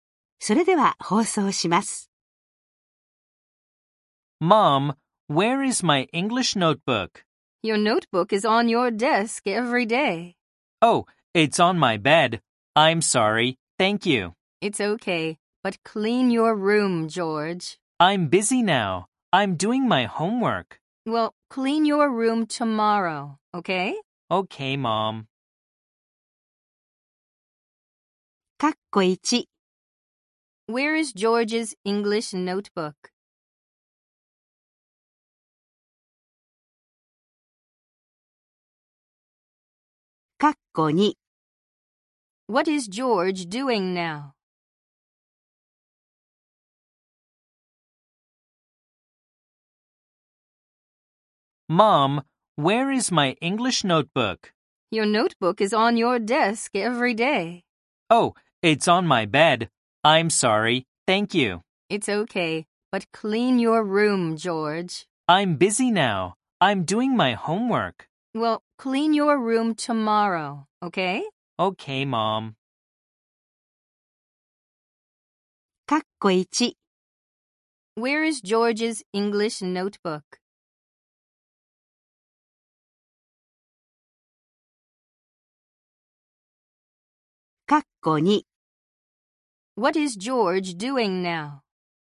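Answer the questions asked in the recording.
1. On his bed.
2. He is doing his homework.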